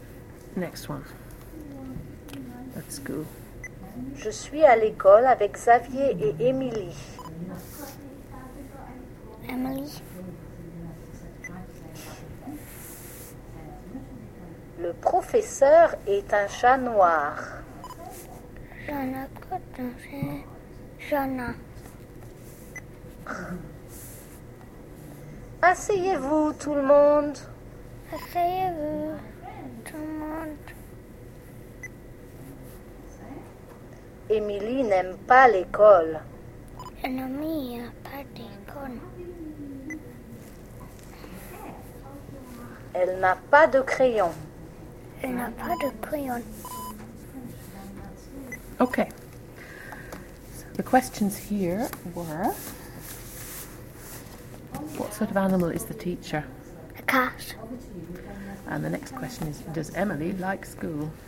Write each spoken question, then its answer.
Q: does Emily like school?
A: I don't think she does. No.